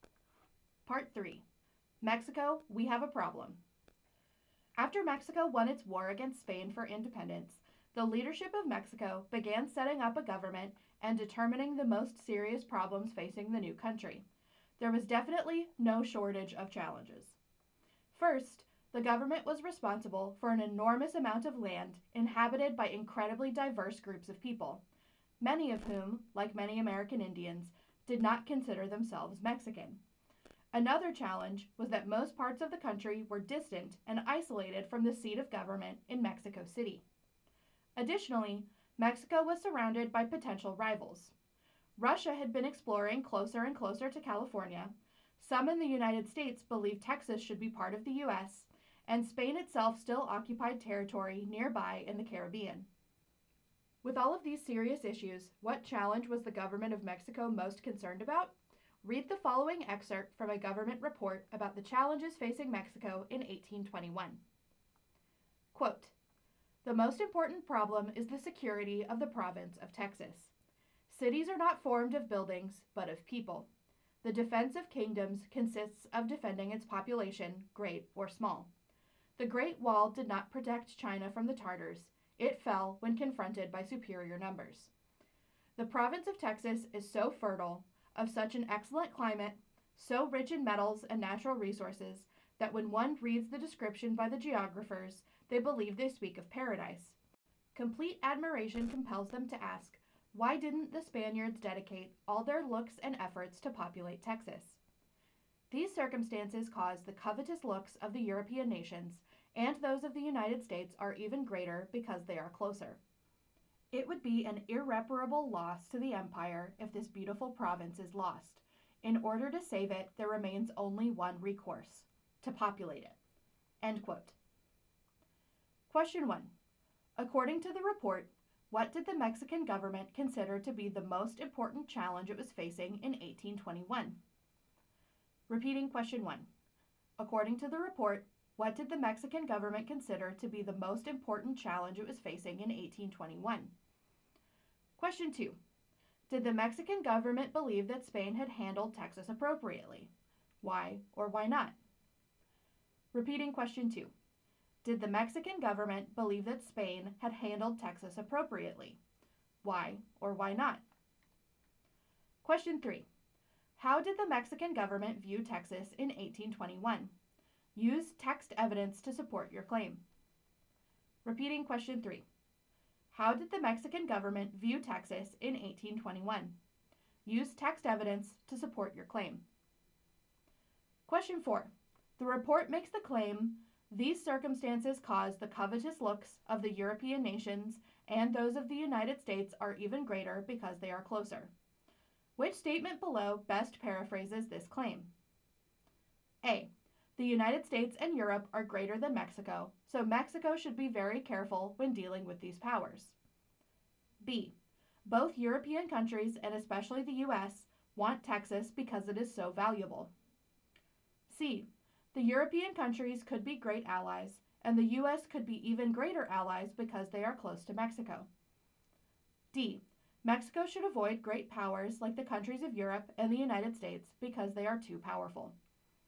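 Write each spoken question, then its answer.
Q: According to the report, what did the Mexican government consider to be the most important challenge it was facing in 1821?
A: The security of the province of Texas

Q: Did the Mexican government believe that Spain had handled Texas appropriately?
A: No, Spain had failed to populate Texas

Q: Which statement below best paraphrases this claim?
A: B: Both European countries, and especially the U.S., want Texas because it is so valuable.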